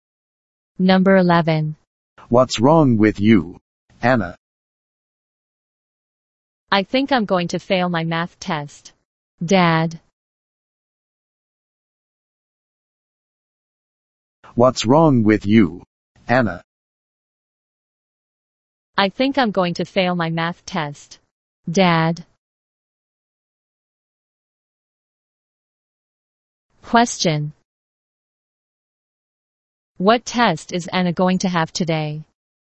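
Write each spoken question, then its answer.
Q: What test is Anna going to have today?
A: A math test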